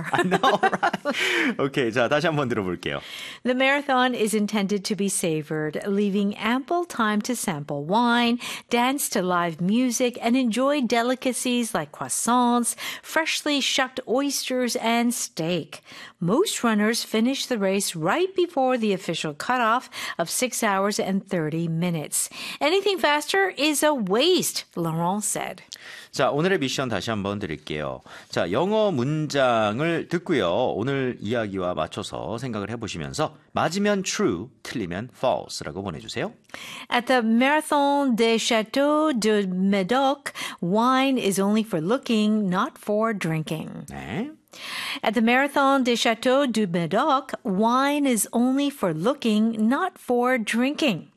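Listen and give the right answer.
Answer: False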